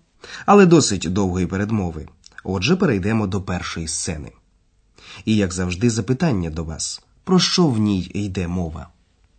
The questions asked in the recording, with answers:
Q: про що в ній йде мова?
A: Сподіваємось, вам було неважко здогадатися, що це був футбольний репортаж.